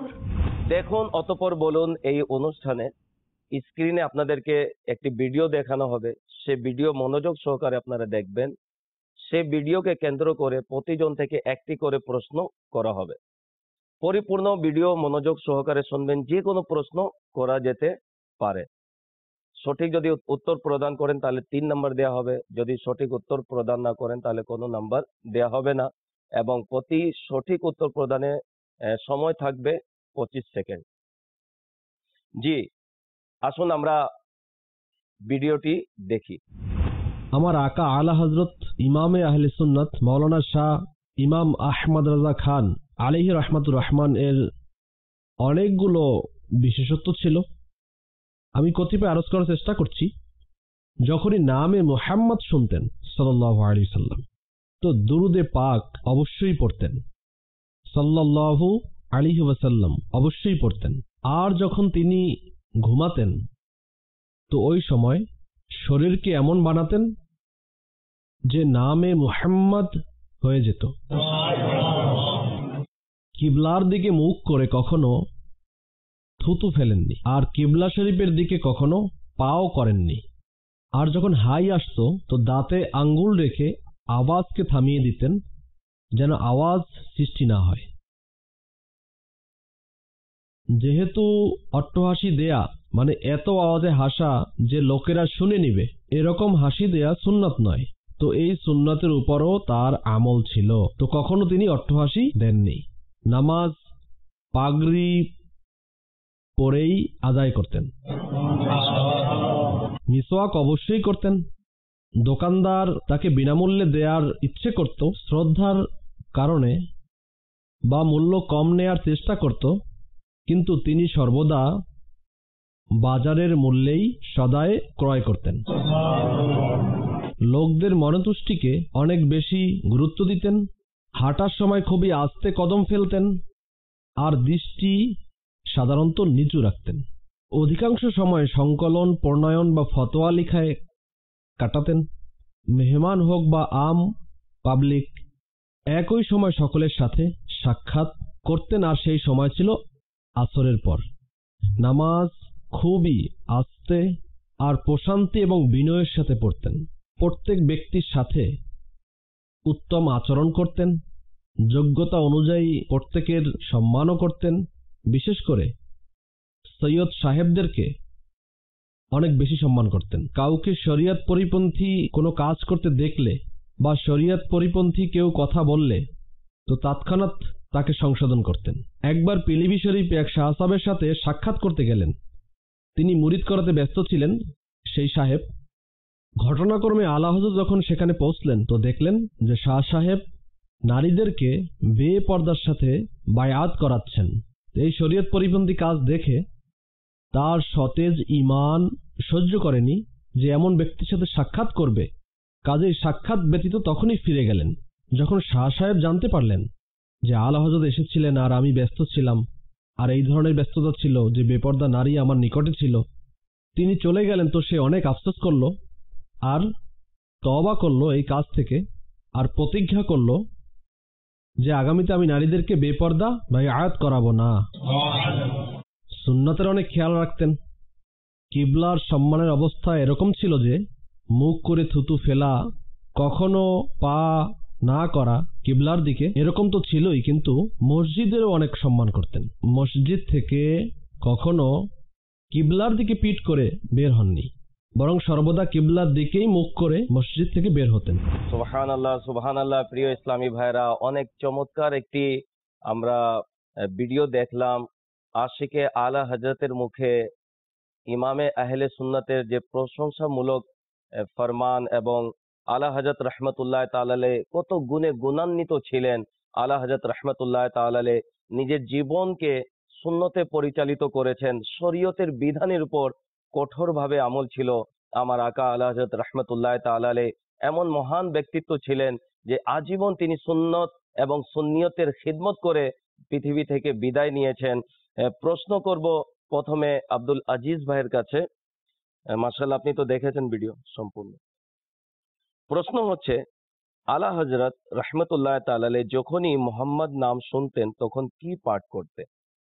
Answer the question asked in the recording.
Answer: সাল্লাল্লাহু আলাইহি ওয়াসাল্লাম, অর্থাৎ দুরূদ শরীফ পাঠ করতেন।